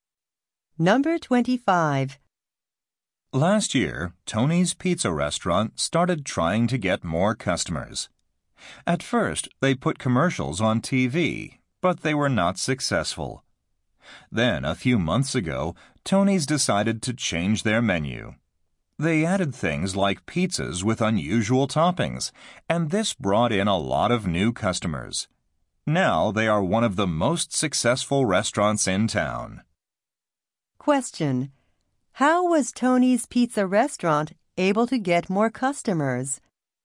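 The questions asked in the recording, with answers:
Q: How was Tony's Pizza Restaurant able to get more customers?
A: By changing its menu with unusual pizzas.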